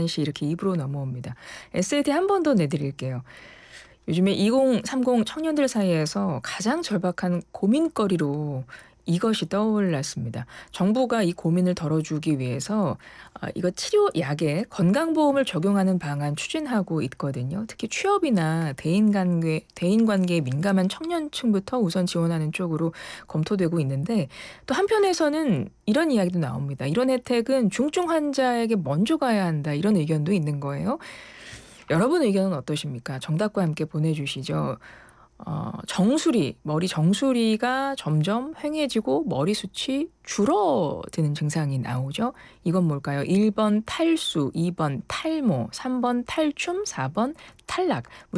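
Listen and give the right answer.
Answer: 2: 탈모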